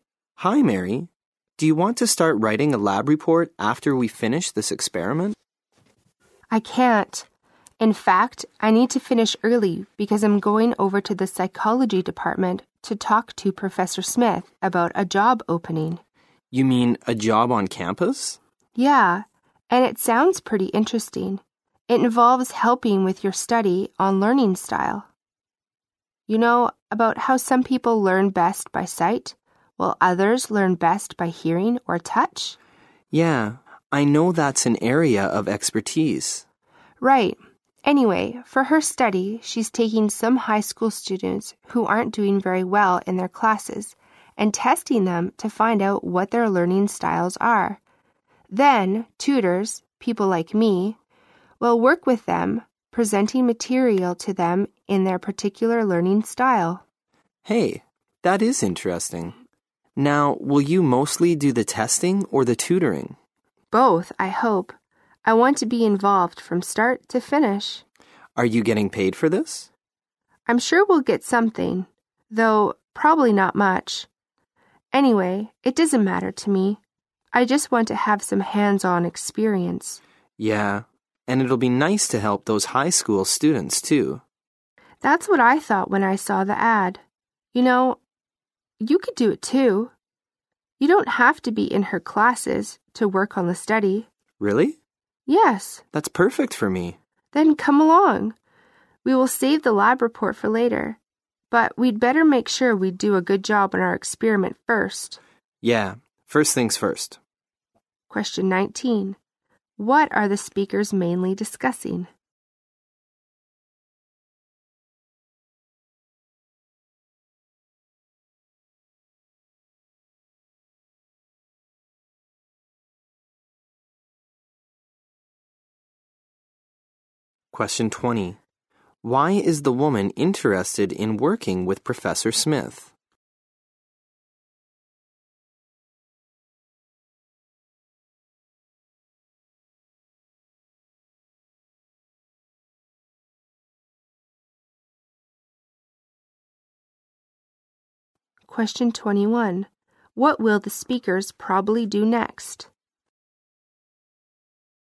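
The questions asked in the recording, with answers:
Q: What are the speakers mainly discussing?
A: A campus job helping with Professor Smith's study on learning styles

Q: Why is the woman interested in working with Professor Smith?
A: She wants hands-on experience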